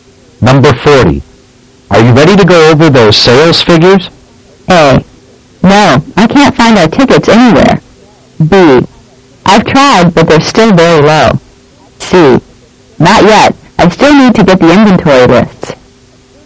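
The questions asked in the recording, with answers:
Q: Are you ready to go over those sales figures?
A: C: Not yet. I still need to get the inventory lists.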